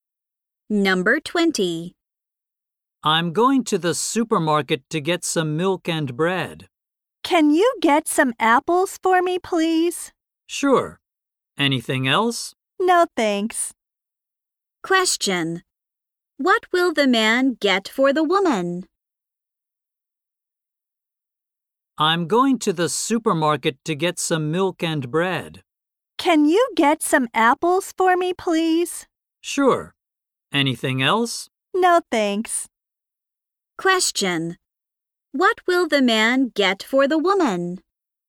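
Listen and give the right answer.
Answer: Apples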